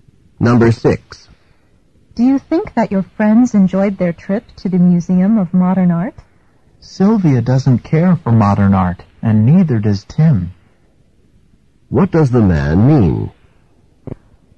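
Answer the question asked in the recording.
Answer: Neither Sylvia nor Tim likes modern art, so they probably didn't enjoy it.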